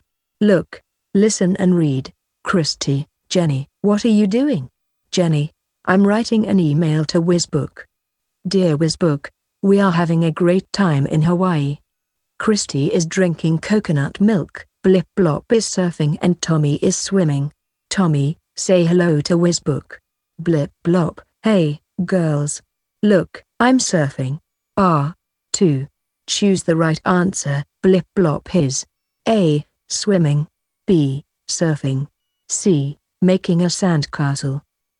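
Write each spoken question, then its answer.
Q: Blip Blop is A. Swimming. B. Surfing. C. Making a sandcastle.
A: B: Surfing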